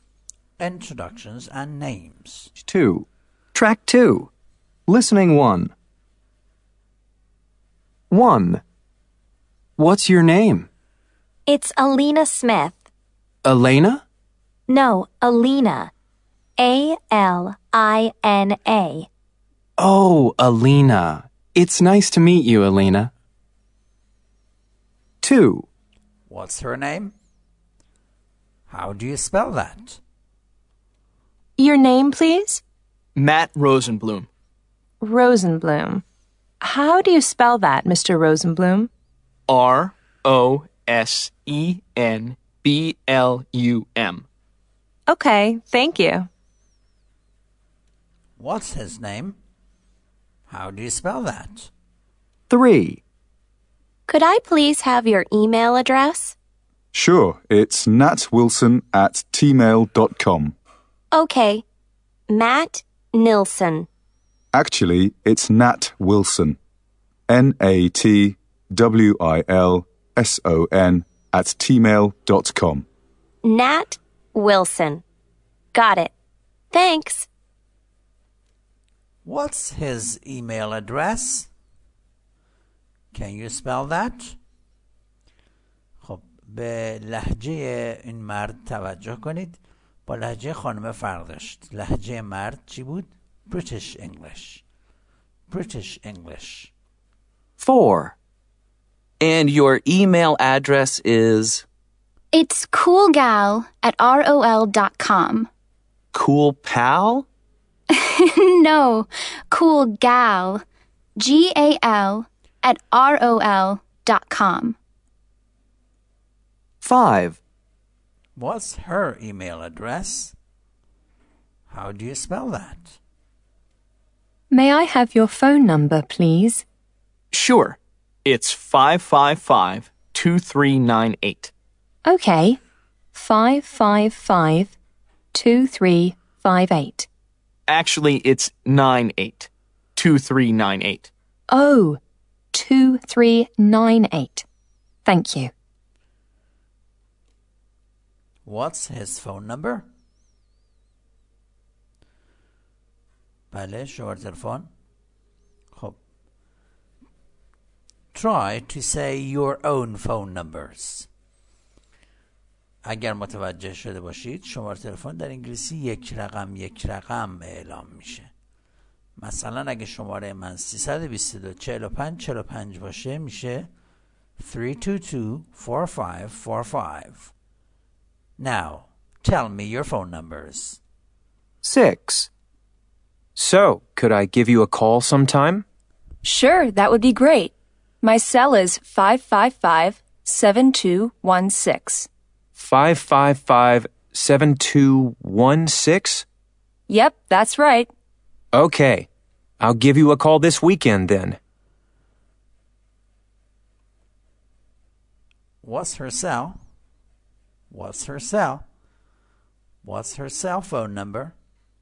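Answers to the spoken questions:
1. Alina, A-L-I-N-A
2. Matt Rosenblum, R-O-S-E-N-B-L-U-M
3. natwilson@tmail.com
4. coolgal@rol.com
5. 555-2398
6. 555-7216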